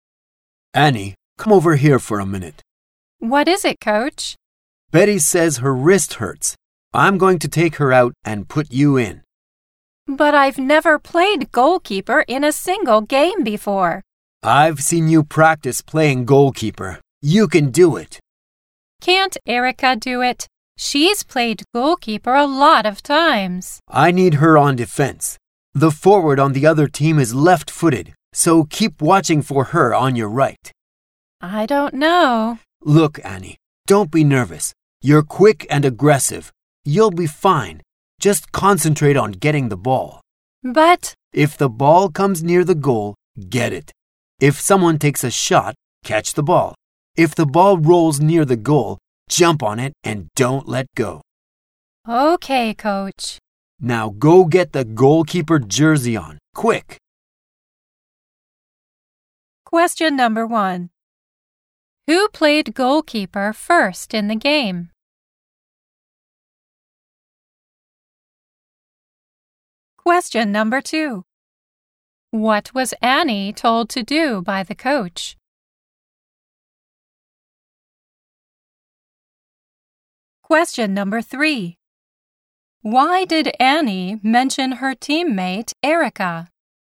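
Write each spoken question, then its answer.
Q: Who played goalkeeper first in the game?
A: Betty

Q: Why did Annie mention her teammate, Erica?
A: Because Erica has played goalkeeper many times, so Annie thought Erica could do it instead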